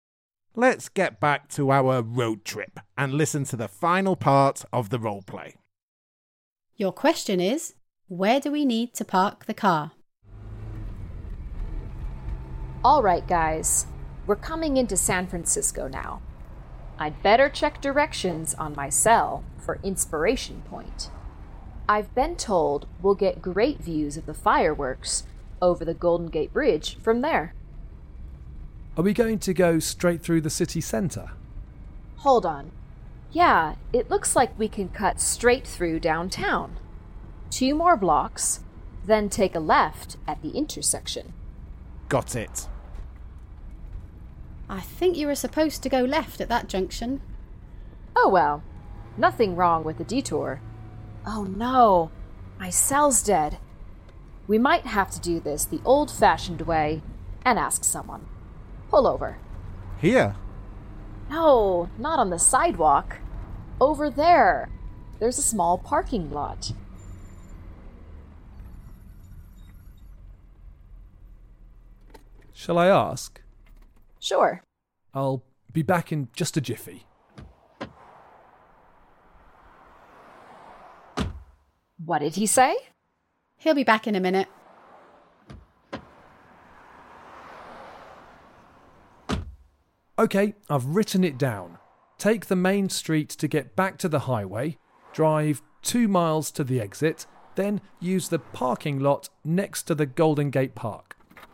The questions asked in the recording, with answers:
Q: where do we need to park the car?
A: The answer was in the car park next to Golden Gate Park.